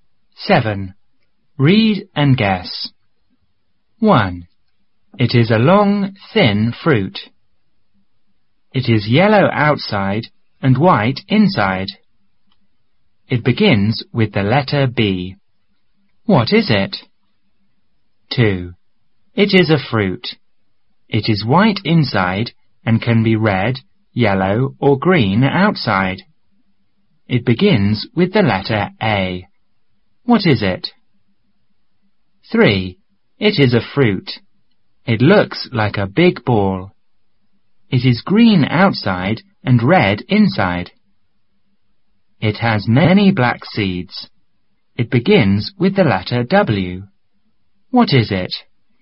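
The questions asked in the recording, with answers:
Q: What is it?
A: A banana

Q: What is it?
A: An apple

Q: What is it?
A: A watermelon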